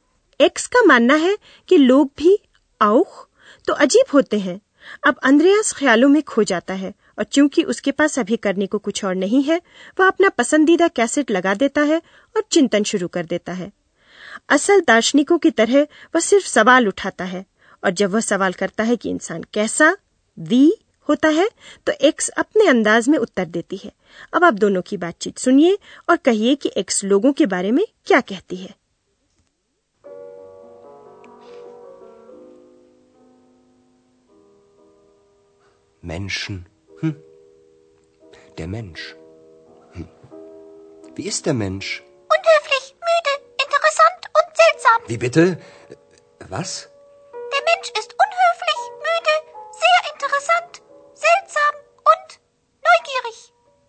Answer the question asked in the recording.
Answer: तो x को मालूम है कि लोग कैसे होते हैं या यूं कहें कि वह सोचती है कि उसे मालूम है कि लोग जिज्ञासु नौगियरिश होते हैं